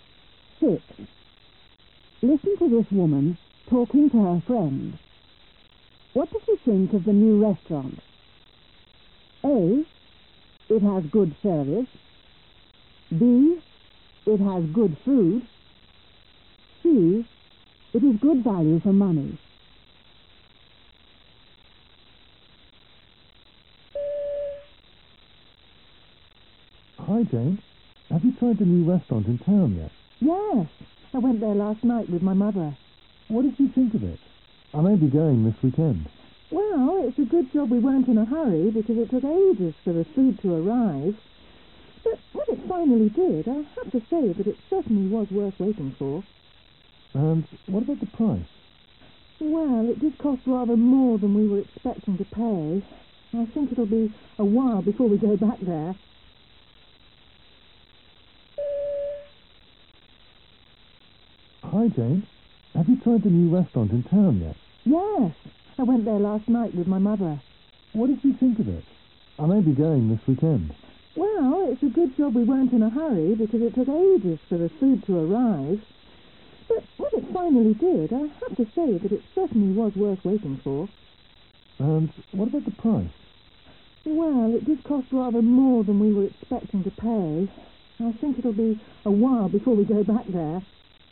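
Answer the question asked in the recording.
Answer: B: It has good food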